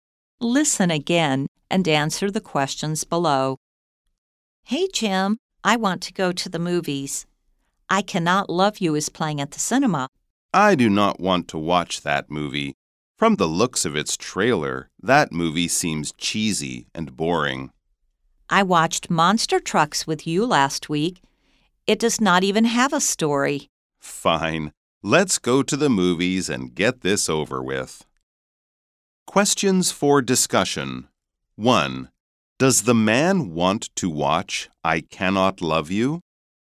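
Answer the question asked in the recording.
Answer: No, he thinks it seems cheesy and boring.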